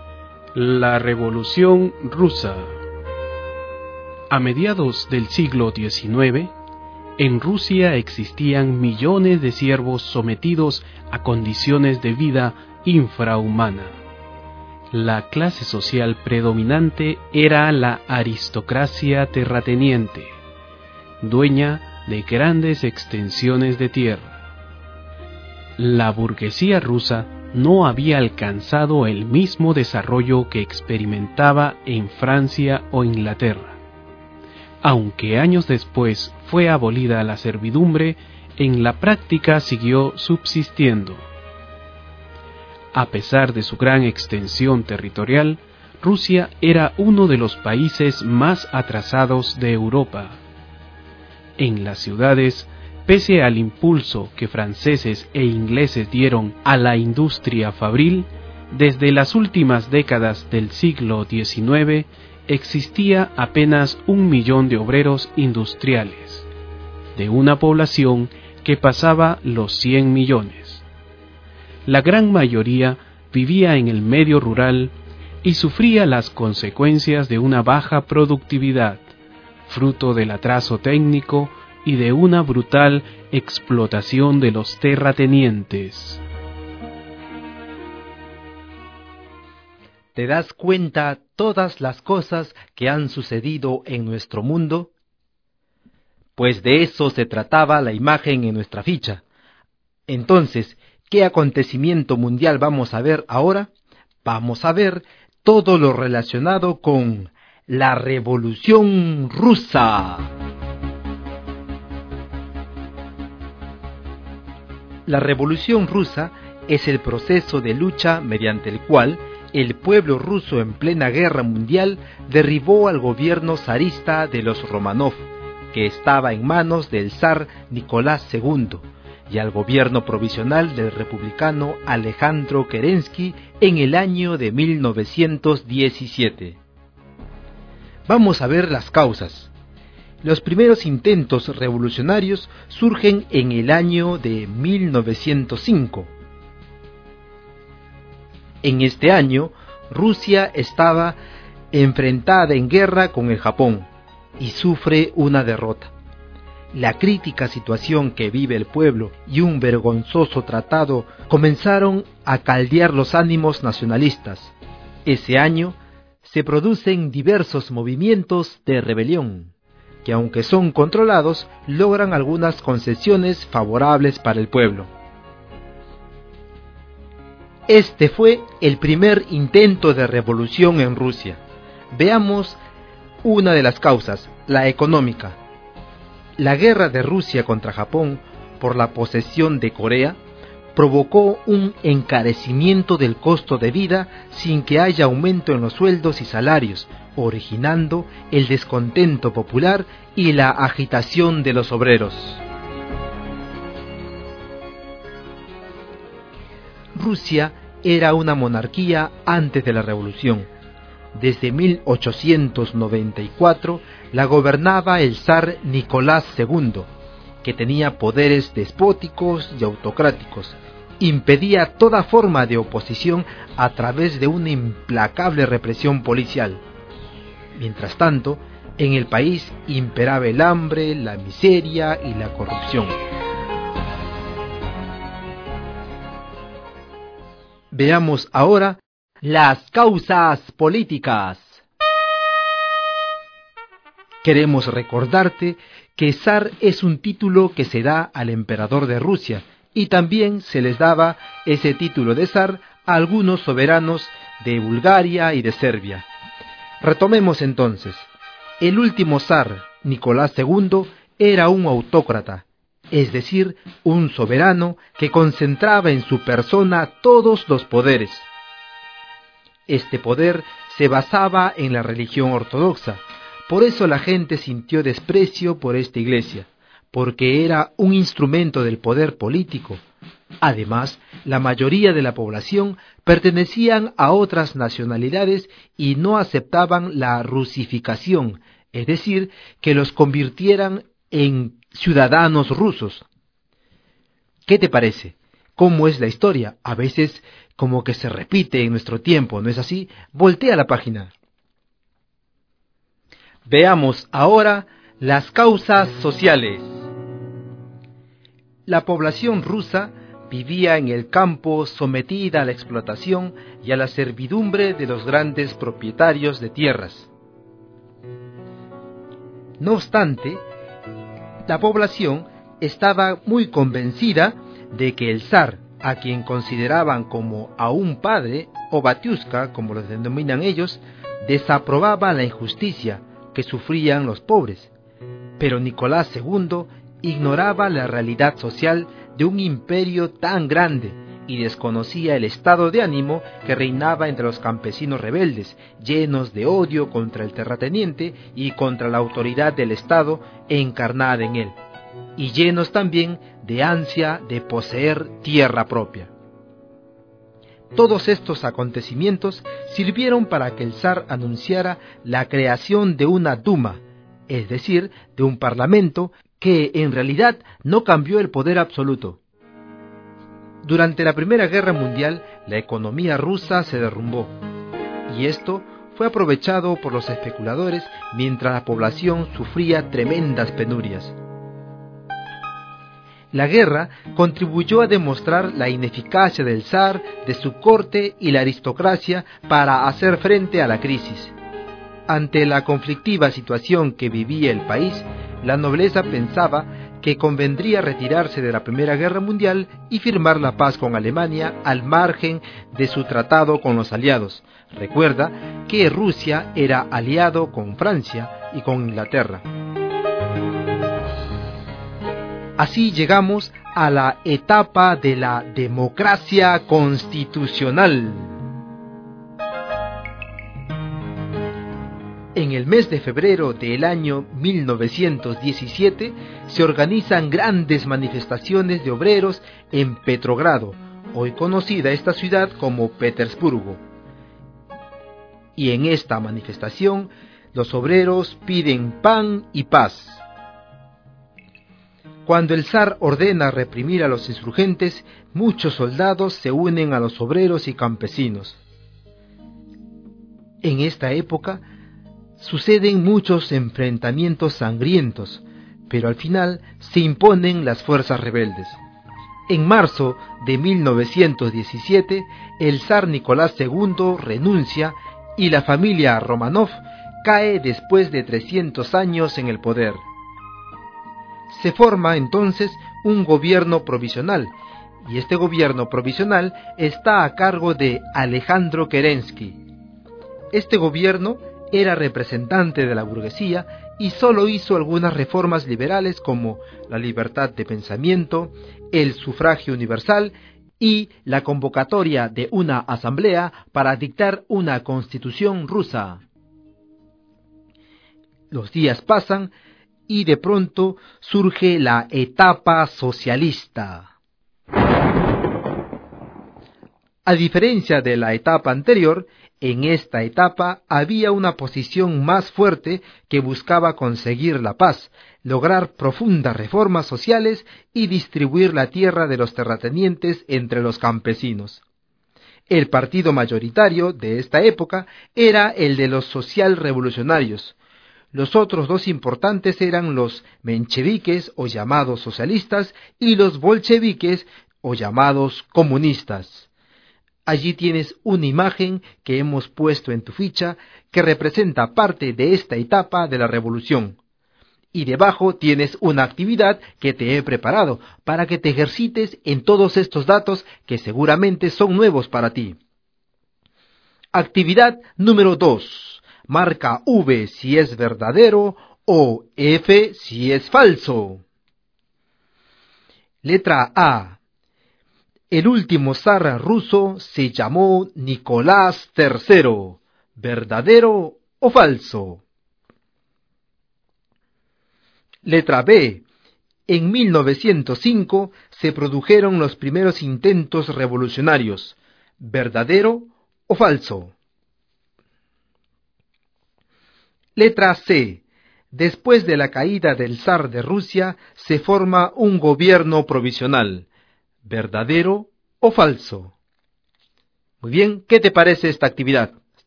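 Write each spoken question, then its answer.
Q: Letra A. El último zar ruso se llamó Nicolás III. ¿Verdadero o falso?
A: Falso (se llamó Nicolás II)

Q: Letra B. En 1905 se produjeron los primeros intentos revolucionarios. ¿Verdadero o falso?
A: Verdadero

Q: Letra C. Después de la caída del zar de Rusia, se forma un gobierno provisional. ¿Verdadero o falso?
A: Verdadero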